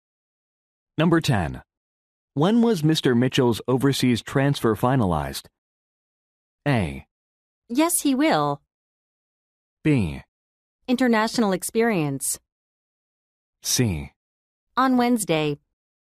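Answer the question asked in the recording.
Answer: C: On Wednesday.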